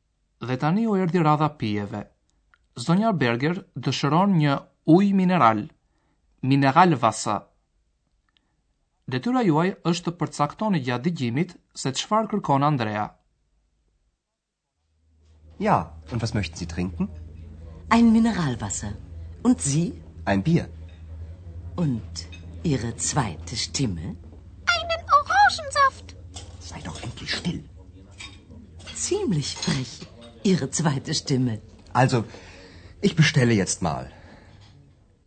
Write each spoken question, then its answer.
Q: Detyra juaj është të përcaktoni gjatë dëgjimit se çfarë kërkon Andrea.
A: Kur Andrea thot se dëshëron një birë